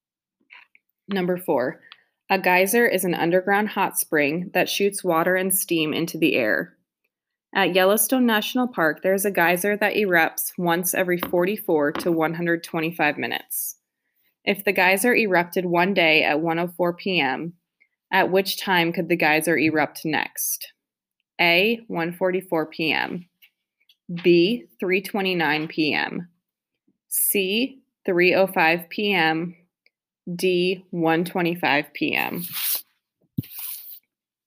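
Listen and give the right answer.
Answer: C: 3:05 p.m.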